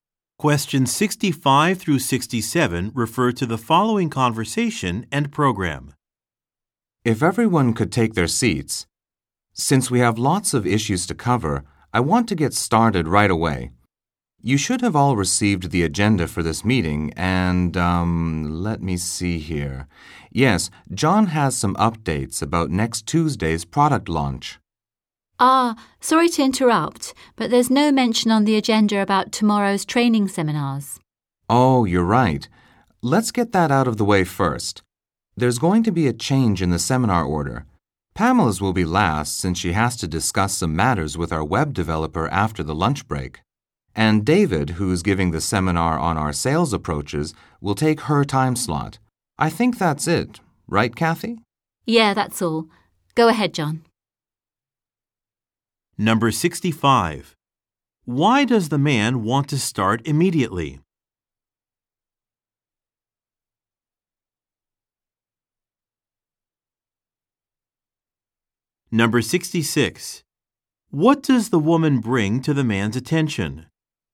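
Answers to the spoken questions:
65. There are lots of issues to cover
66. Tomorrow's training seminars are not on the agenda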